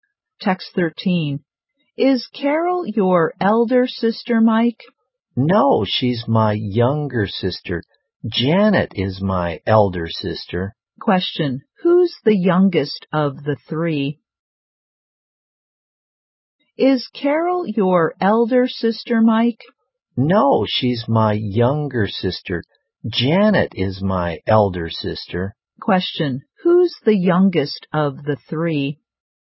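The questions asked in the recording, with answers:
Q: Who's the youngest of the three?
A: Carol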